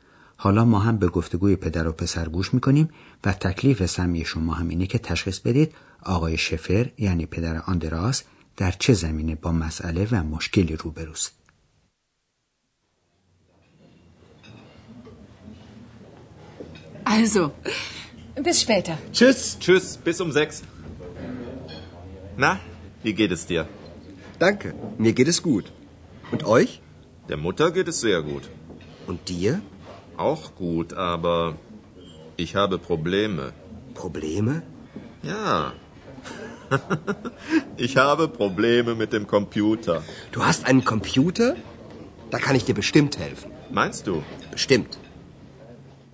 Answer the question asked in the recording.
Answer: بله، آقای شفر در رابطه با کامپیوتر خودش مشکلاتی داره.